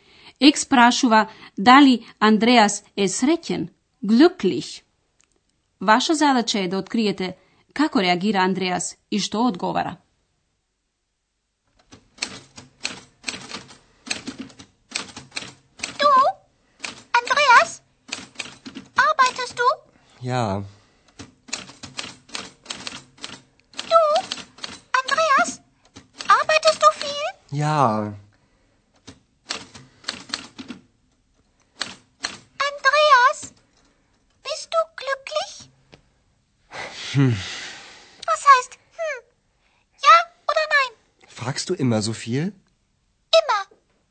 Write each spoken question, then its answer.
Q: Ваша задача е да откриете како реагира Андреас и што одговара.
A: На прашањата на Екс, Андреас нешто мрмори пред себе и го прашува Екс дали тој секогаш толку многу прашува.